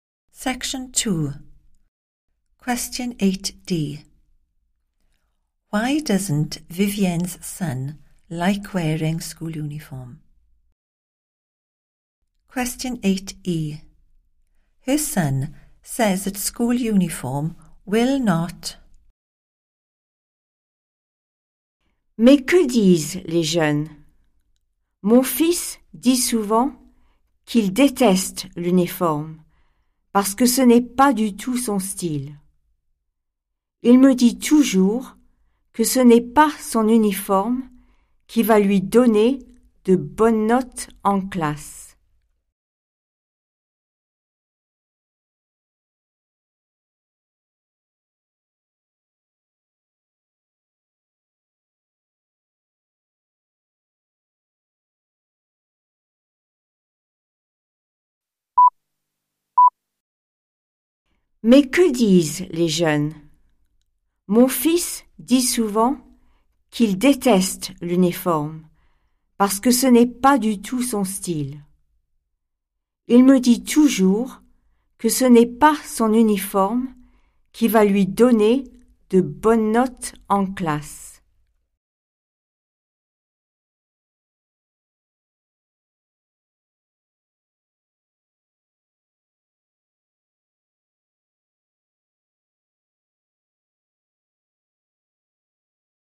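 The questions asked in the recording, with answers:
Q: Why doesn't Vivienne's son like wearing school uniform?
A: it's not his style

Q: Her son says that school uniform will not...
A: give him good marks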